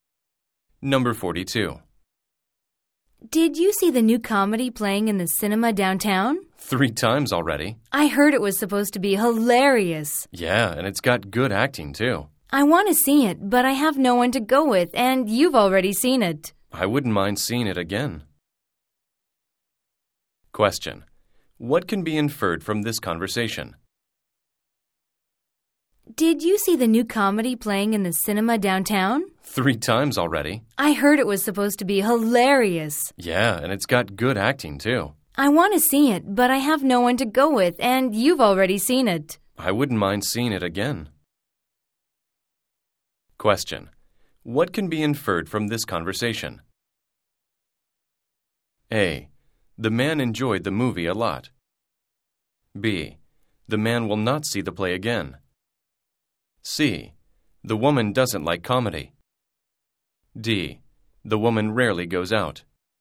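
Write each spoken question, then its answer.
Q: What can be inferred from this conversation?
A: A: The man enjoyed the movie a lot.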